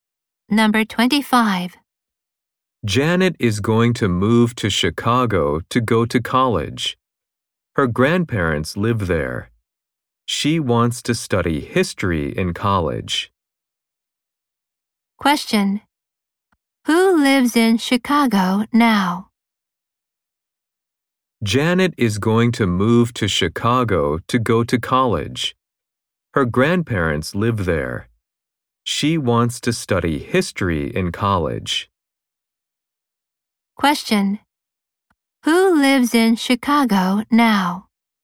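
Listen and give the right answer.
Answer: Janet's grandparents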